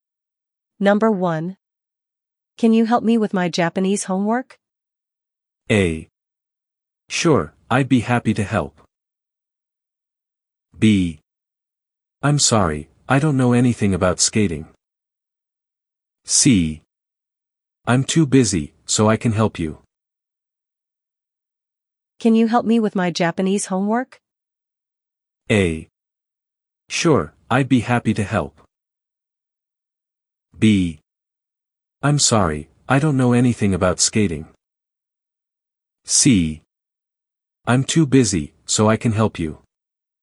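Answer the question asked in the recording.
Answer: A: Sure, I'd be happy to help.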